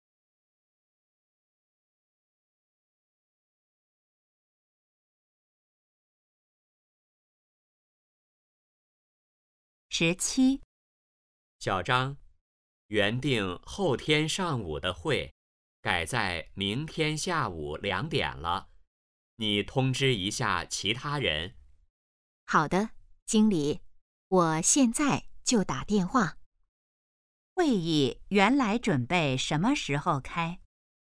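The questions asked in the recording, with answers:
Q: 会议原来准备什么时候开?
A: 后天上午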